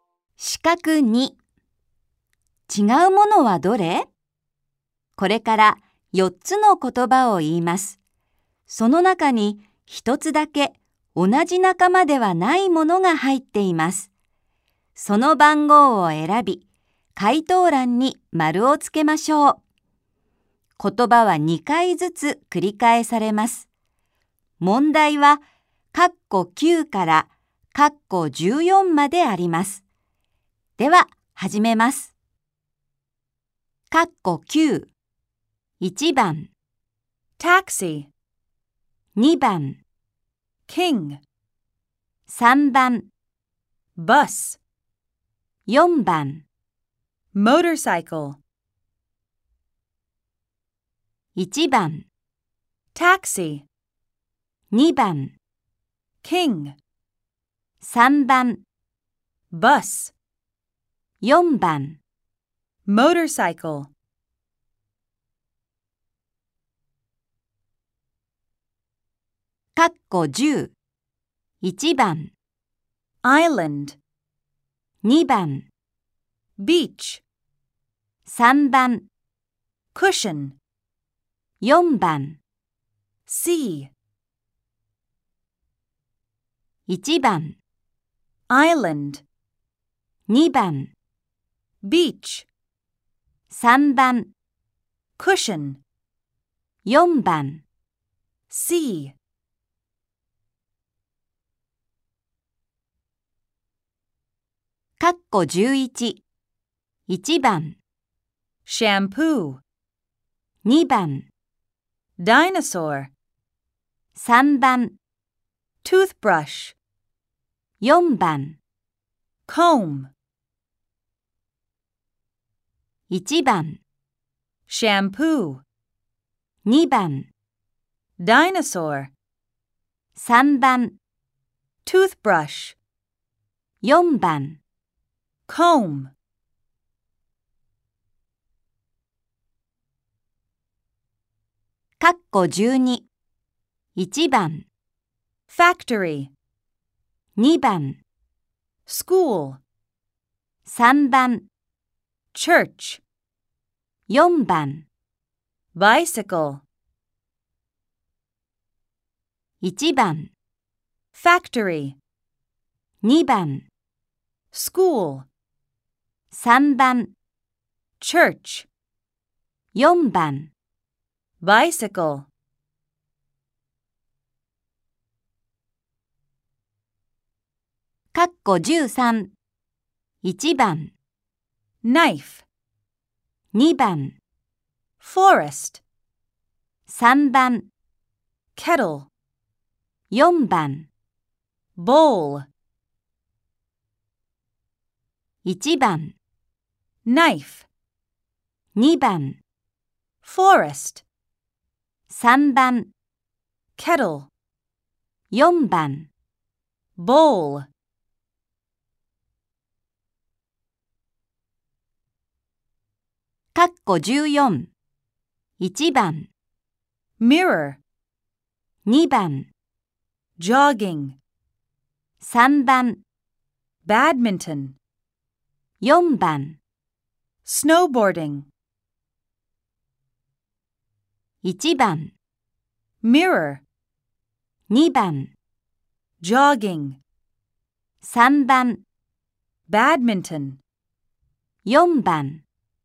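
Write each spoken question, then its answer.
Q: 違うものはどれ?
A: 2: キング

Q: 違うものはどれ?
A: 3: クッション

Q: 違うものはどれ?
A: 2: ダイナソー

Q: 違うものはどれ?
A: 4: Bicycle

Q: 違うものはどれ?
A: 2: Forest

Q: 違うものはどれ?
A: 1: Mirror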